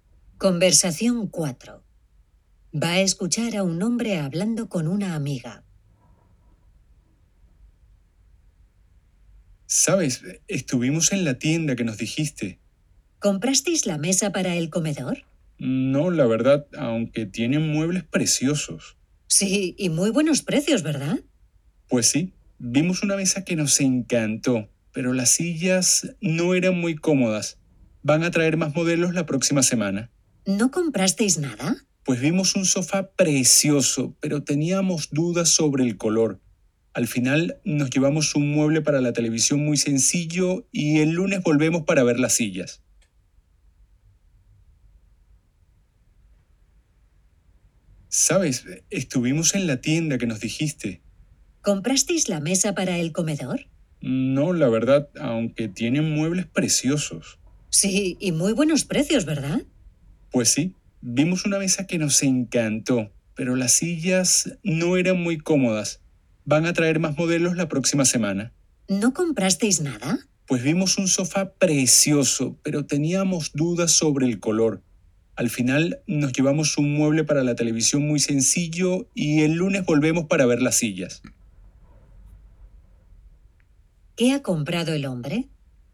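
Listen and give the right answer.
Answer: Un mueble para la televisión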